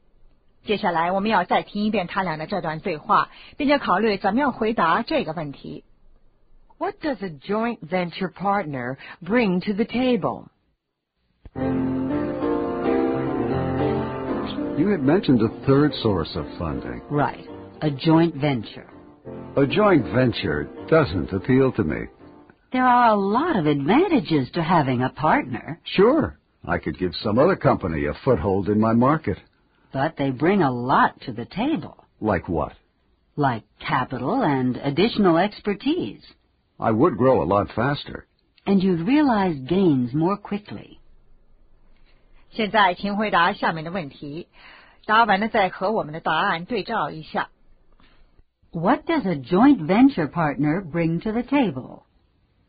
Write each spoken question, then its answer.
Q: What does a joint venture partner bring to the table?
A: Capital and expertise.